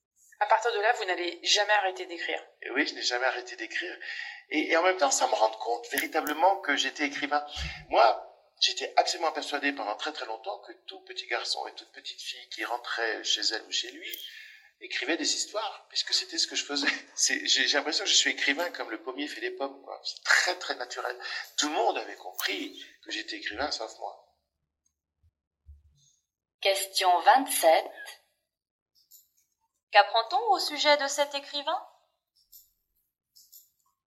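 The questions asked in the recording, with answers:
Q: Qu'apprend-on au sujet de cet écrivain?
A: Écrire lui est naturel, il a mis longtemps à comprendre qu'il était écrivain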